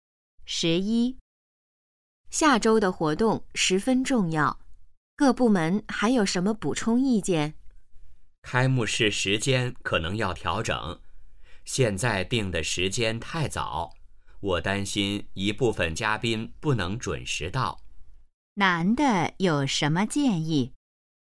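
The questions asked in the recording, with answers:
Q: 男的有什么建议?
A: 调整开幕式时间(推迟)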